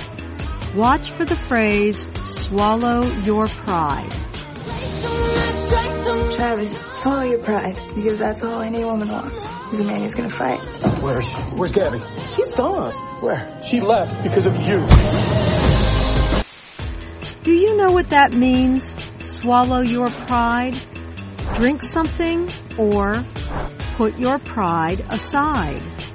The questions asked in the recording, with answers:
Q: Do you know what that means, swallow your pride?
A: Swallow your pride means to put your pride aside.